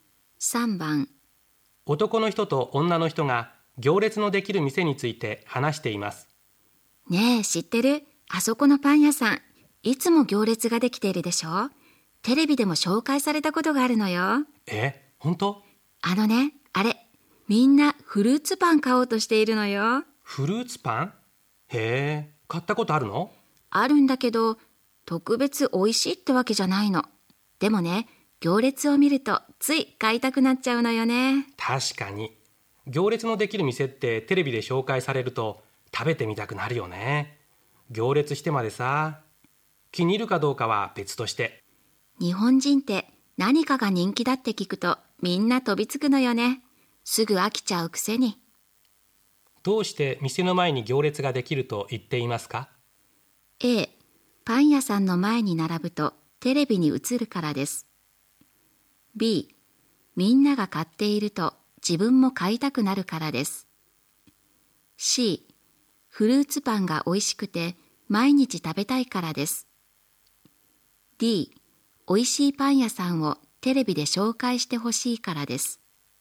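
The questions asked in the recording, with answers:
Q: どうして店の前に行列ができると言っていますか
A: B: みんなが買っていると自分も買いたくなるからです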